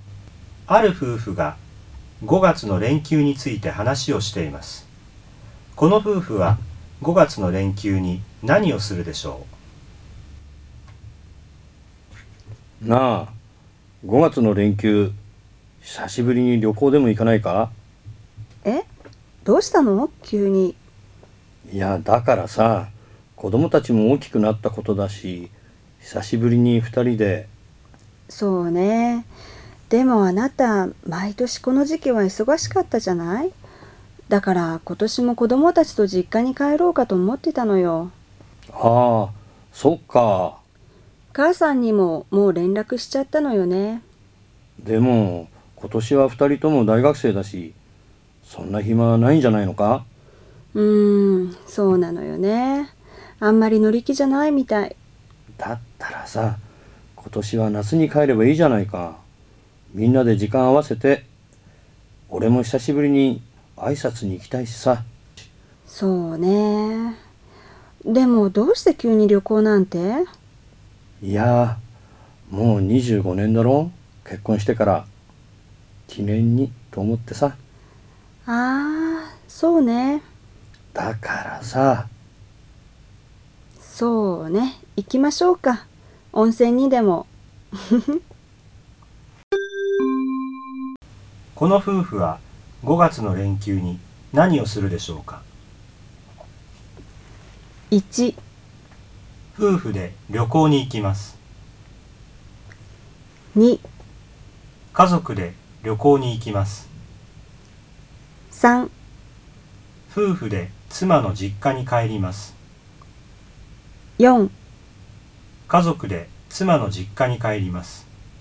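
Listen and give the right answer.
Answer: 1: 夫婦で旅行に行きます。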